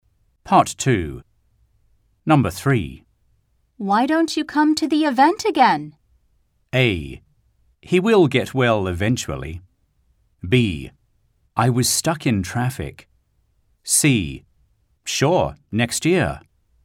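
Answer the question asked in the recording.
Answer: C: Sure, next year.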